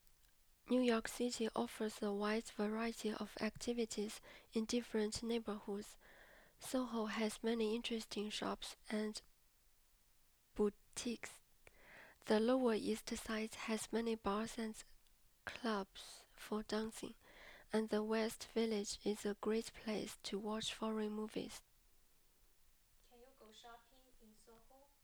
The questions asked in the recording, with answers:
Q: Can you go shopping in Soho?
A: Yes, I can go shopping in Soho.